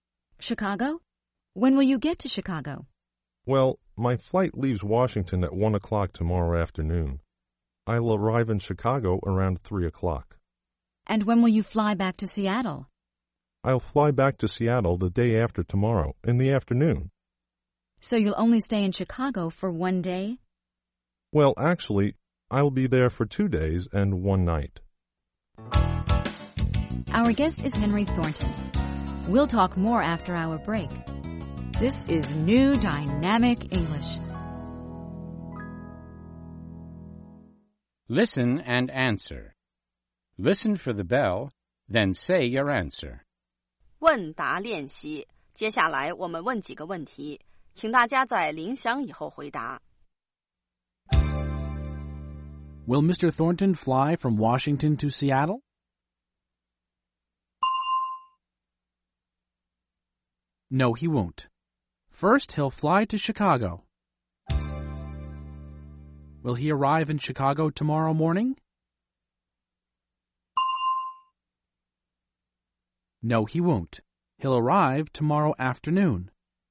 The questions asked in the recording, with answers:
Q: Will Mr. Thornton fly from Washington to Seattle?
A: No, he won't. First, he'll fly to Chicago.